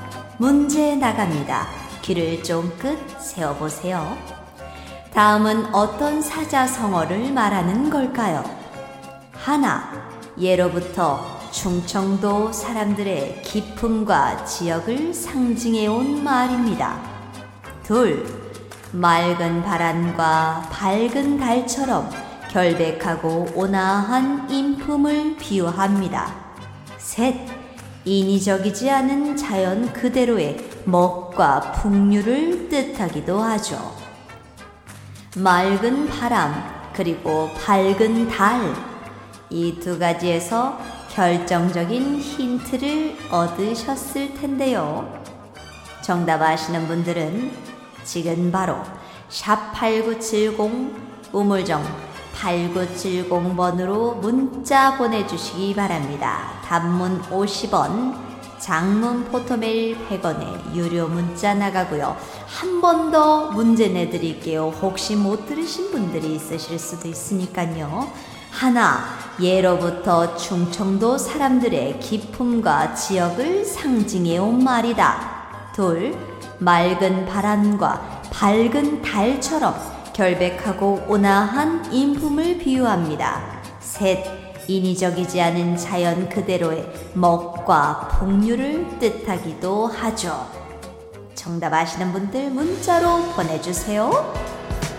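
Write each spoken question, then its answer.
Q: 다음은 어떤 사자성어를 말하는 걸까요?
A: 청풍명월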